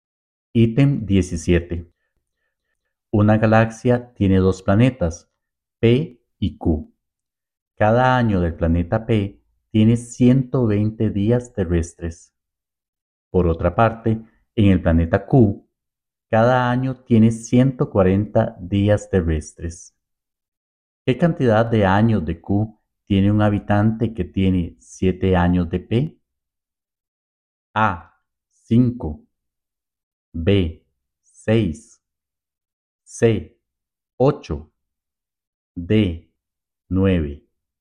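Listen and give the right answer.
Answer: B: 6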